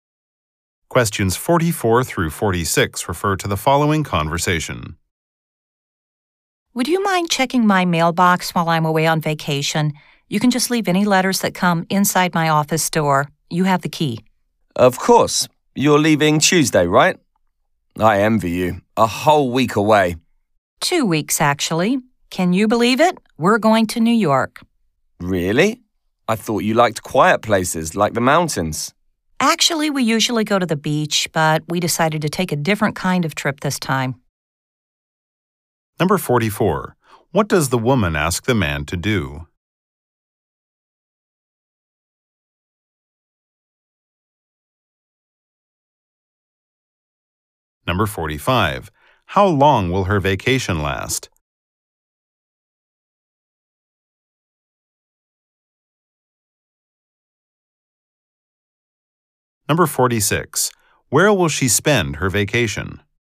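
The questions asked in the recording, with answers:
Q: What does the woman ask the man to do?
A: Check her mailbox

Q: How long will her vacation last?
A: Two weeks

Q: Where will she spend her vacation?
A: New York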